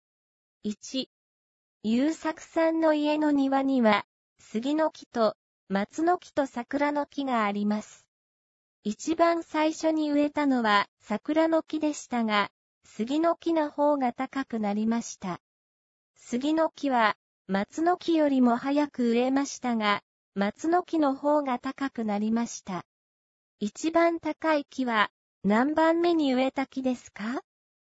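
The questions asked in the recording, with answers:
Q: 一番高い木は何番目に植えた木ですか?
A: 3番目(松の木)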